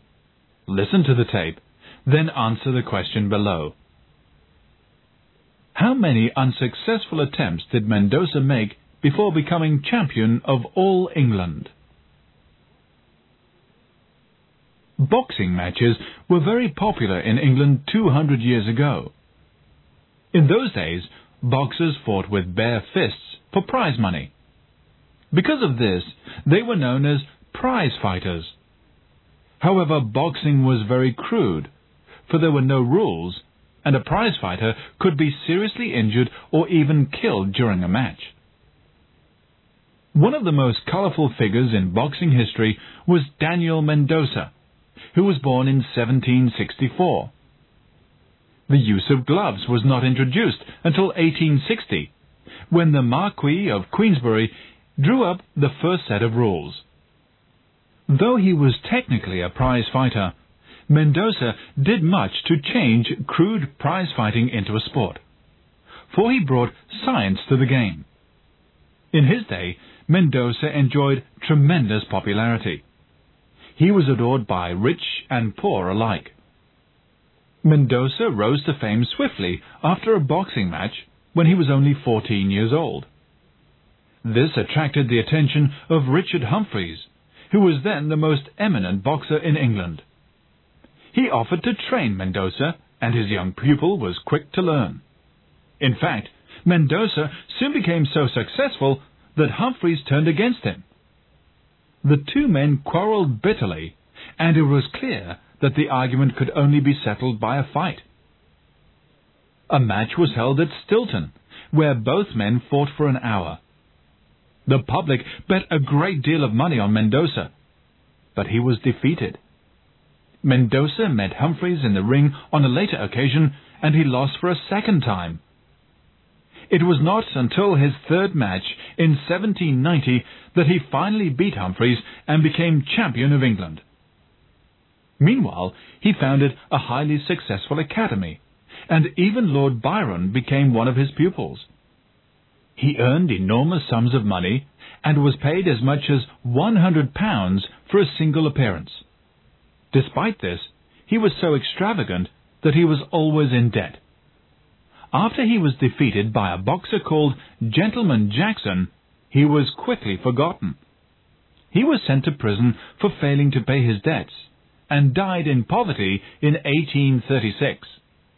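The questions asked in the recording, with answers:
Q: How many unsuccessful attempts did Mendoza make before becoming champion of all England?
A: Two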